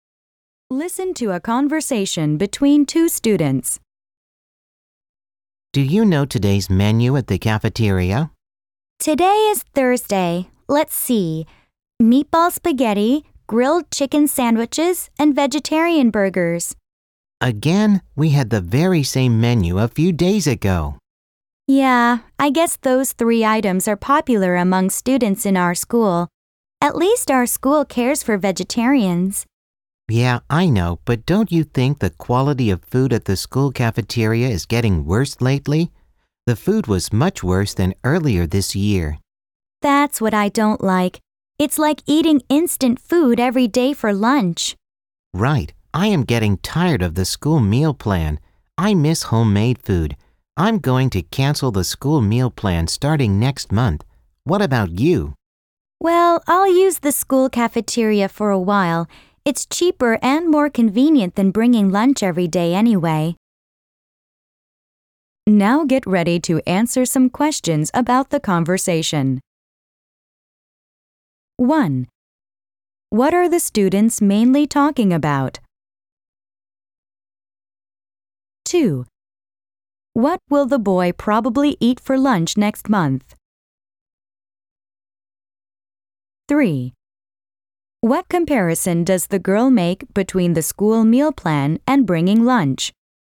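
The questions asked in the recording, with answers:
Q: What are the students mainly talking about?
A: The school cafeteria food and meal plan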